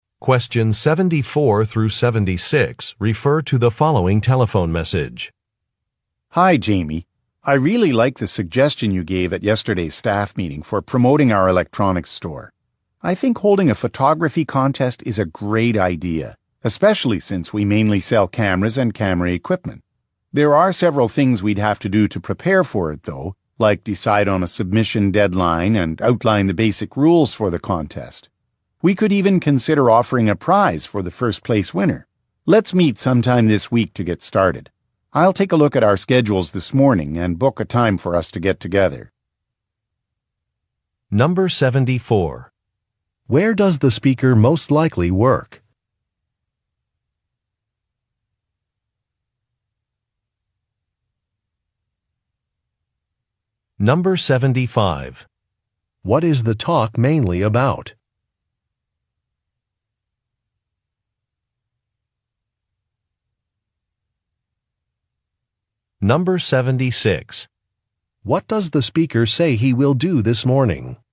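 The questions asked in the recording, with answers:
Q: Where does the speaker most likely work?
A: At an electronics store

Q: What is the talk mainly about?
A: Preparing a photography contest to promote the store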